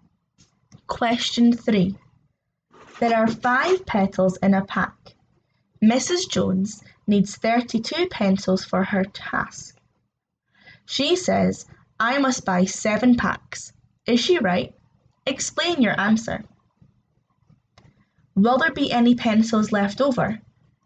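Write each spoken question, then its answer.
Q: Is she right? Explain your answer.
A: Yes: 7 packs of 5 is 35, which is enough for 32 (6 packs is only 30)

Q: Will there be any pencils left over?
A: Yes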